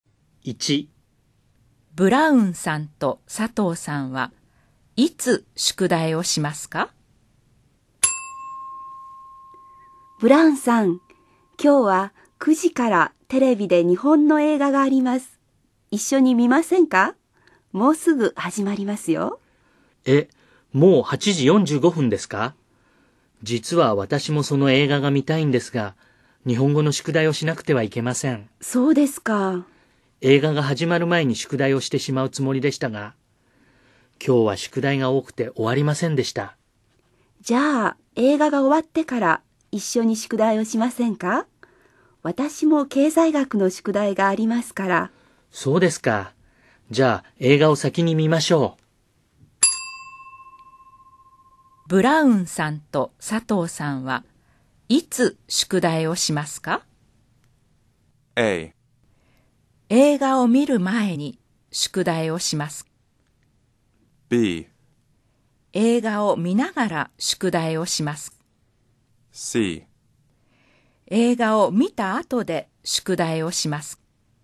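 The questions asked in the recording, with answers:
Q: ブラウンさんと佐藤さんはいつ宿題をしますか?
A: C: 映画を見た後で宿題をします。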